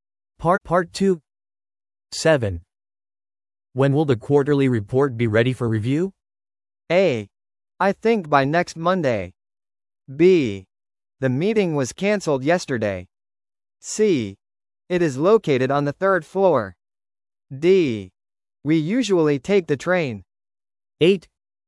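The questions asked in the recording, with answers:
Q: When will the quarterly report be ready for review?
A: A: I think by next Monday.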